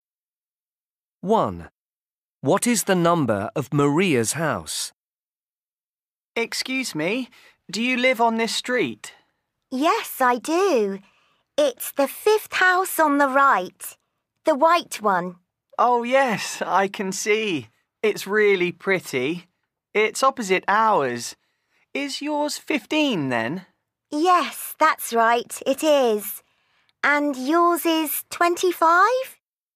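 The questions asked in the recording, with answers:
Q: What is the number of Maria's house?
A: 15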